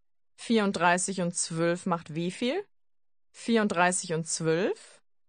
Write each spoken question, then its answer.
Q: 34 und 12 macht wie viel?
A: 46. 34 und 12 macht 46.